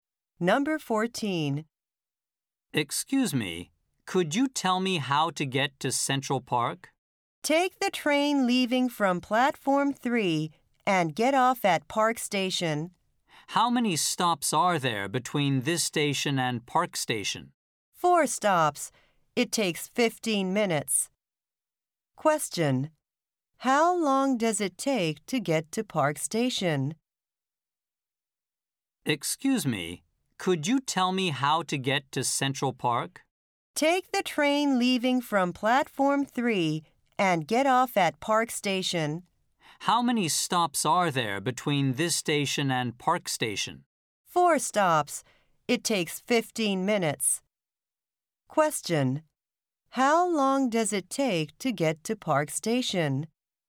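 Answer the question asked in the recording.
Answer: 15 minutes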